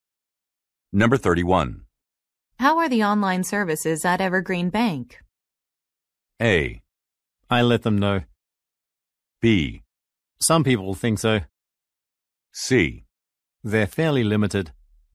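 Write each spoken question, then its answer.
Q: How are the online services at Evergreen Bank?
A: C: They're fairly limited.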